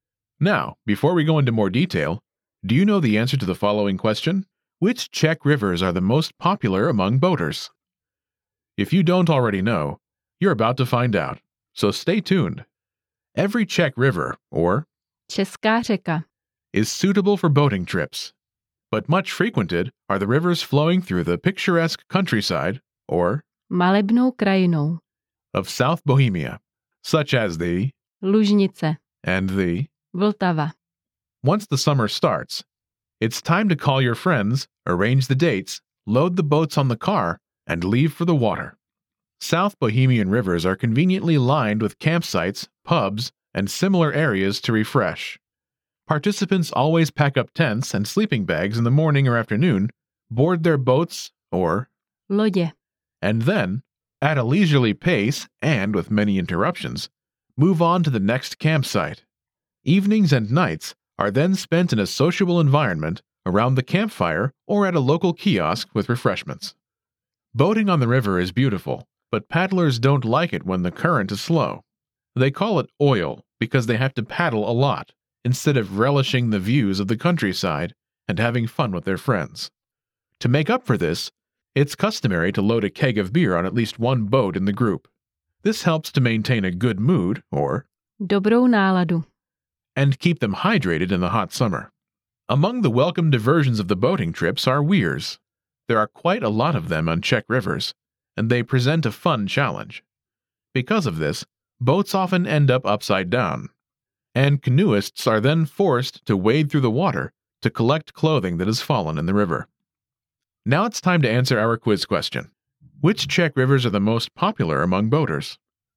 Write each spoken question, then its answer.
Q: Which Czech rivers are the most popular among boaters?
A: Most Czech rivers are used for boating, but the most popular are those in South Bohemia, especially the Lužnice and the Vltava.